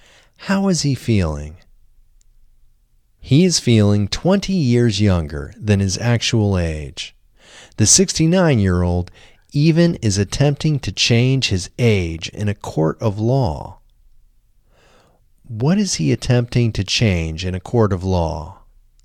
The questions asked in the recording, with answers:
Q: What is he attempting to change in a court of law?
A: He is attempting to change his age in a court of law.